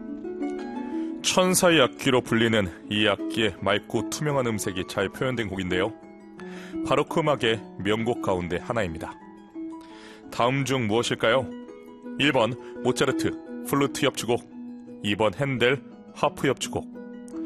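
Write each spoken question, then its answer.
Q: 다음 중 무엇일까요?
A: 2: 핸델 하프 협주곡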